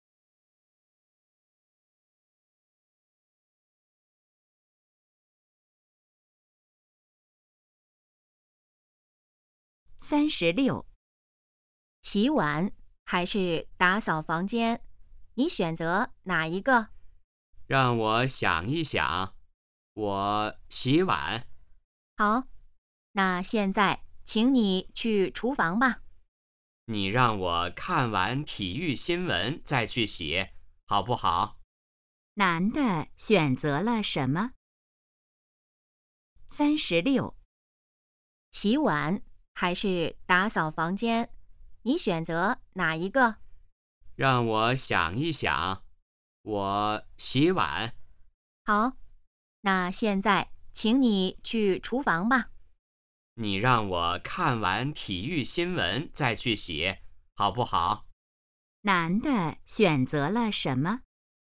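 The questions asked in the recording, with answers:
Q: 男的选择了什么?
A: 洗碗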